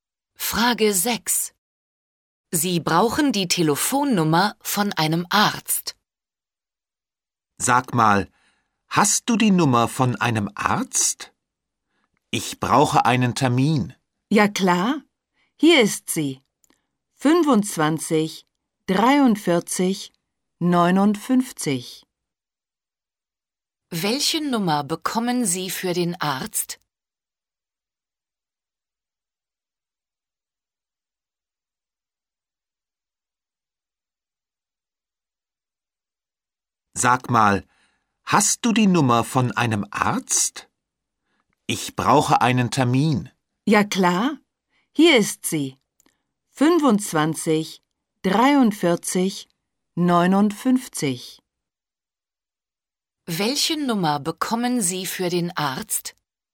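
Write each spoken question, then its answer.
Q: Welche Nummer bekommen Sie für den Arzt?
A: 25 43 59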